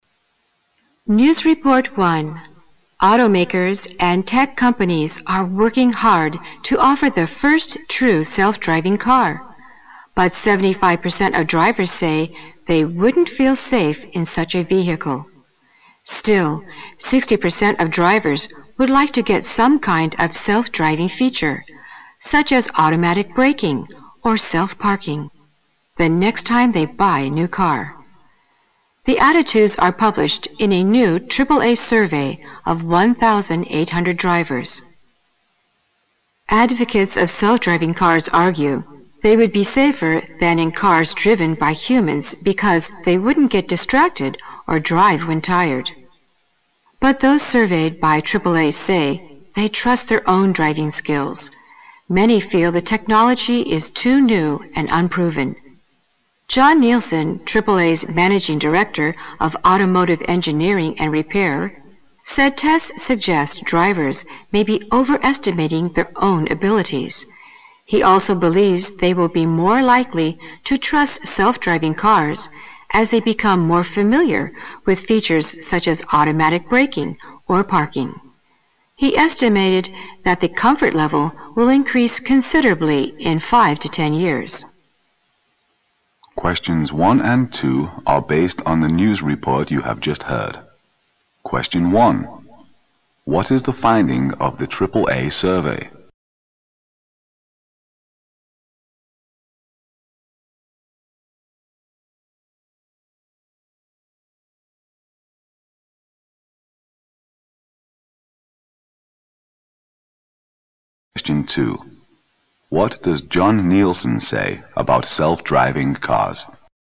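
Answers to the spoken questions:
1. Most drivers (75%) wouldn't feel safe in a self-driving car, though 60% want some self-driving features.
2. Drivers will trust them more as they become familiar with features like automatic braking or parking.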